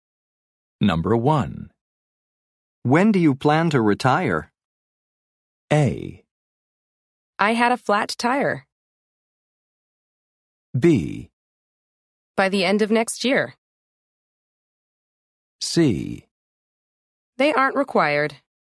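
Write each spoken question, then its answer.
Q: When do you plan to retire?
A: B: By the end of next year.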